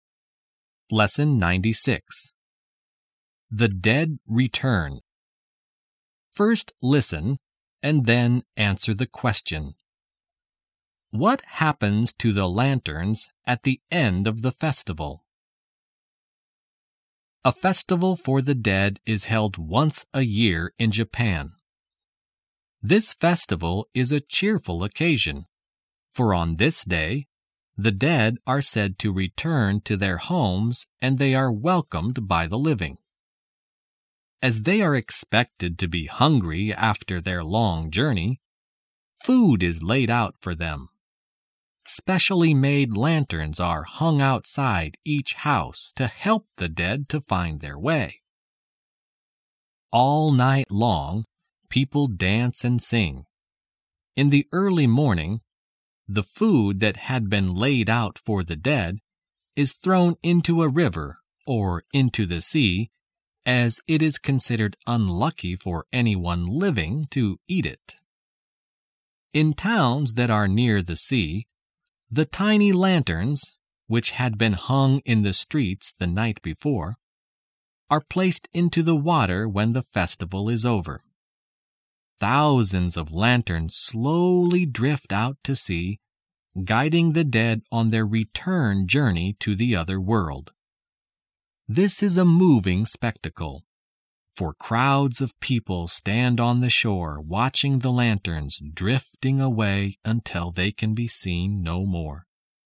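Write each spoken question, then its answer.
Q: What happens to the lanterns at the end of the festival?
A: They are placed into the water and drift out to sea, guiding the dead back to the other world.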